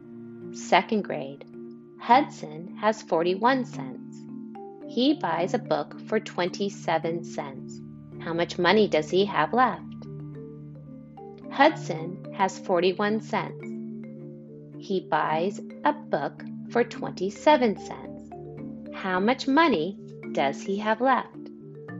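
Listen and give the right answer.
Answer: 14 cents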